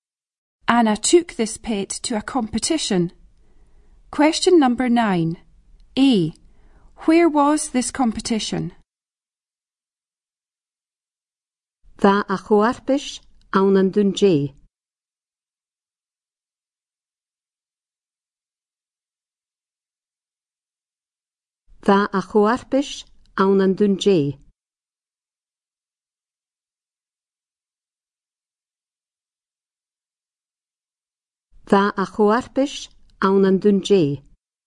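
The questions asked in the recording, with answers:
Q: Where was this competition?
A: In Dundee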